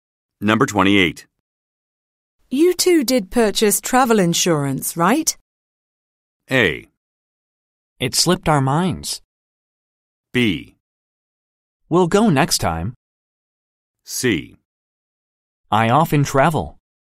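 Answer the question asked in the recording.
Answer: A: It slipped our minds.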